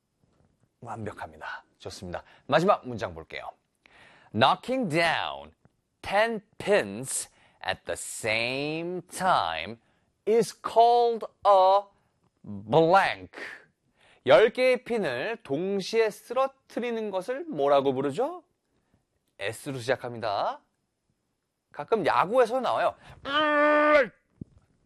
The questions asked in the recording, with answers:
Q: Knocking down 10 pins at the same time is called a blank.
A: Strike.